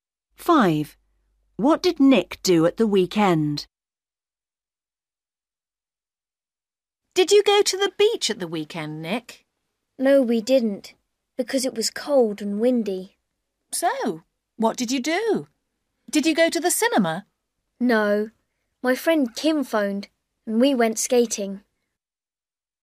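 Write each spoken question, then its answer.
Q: What did Nick do at the weekend?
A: He went skating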